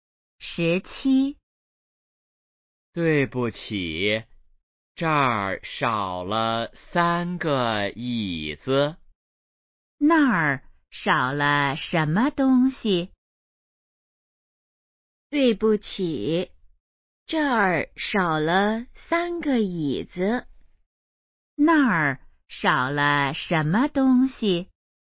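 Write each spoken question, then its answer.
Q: 那儿少了什么东西?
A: 三个椅子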